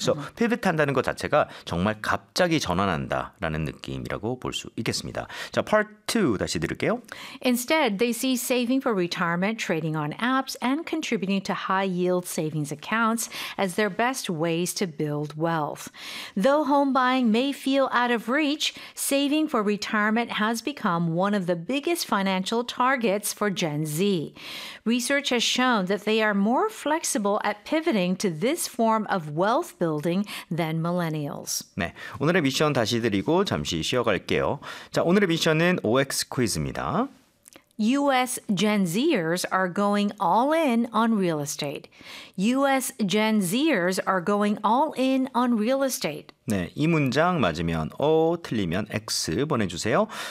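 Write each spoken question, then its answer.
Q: U.S. Gen Zers are going all in on real estate.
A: X (False)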